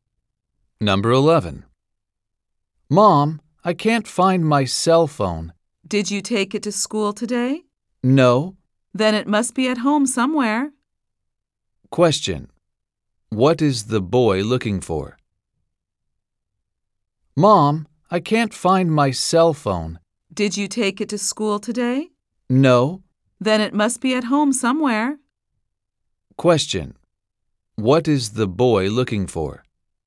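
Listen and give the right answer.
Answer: His cell phone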